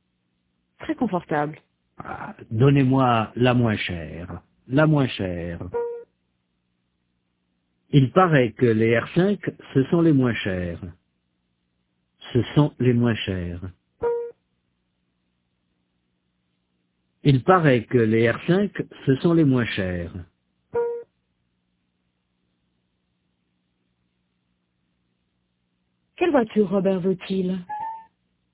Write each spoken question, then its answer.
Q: Quelle voiture Robert veut-il?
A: La moins chère.